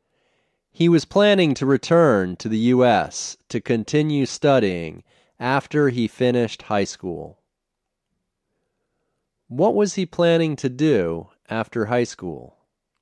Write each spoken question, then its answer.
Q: What was he planning to do after high school?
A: He was planning to return to the U.S.